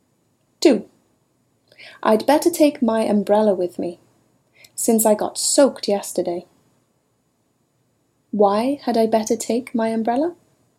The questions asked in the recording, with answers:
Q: Why had I better take my umbrella?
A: You should take your umbrella because you got soaked yesterday.